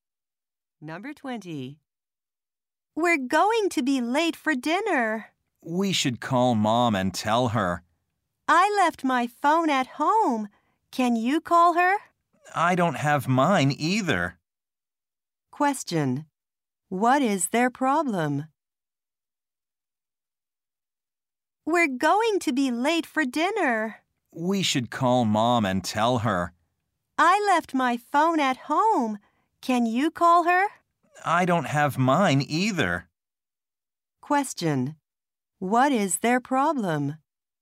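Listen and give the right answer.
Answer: They don't have a phone to call Mom.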